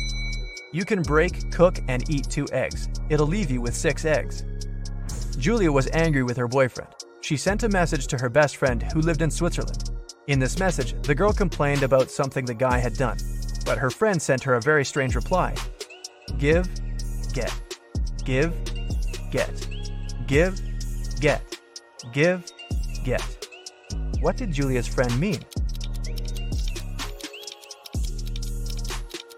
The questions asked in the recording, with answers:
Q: What did Julia's friend mean?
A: She wanted to say that Julia should forgive and forget.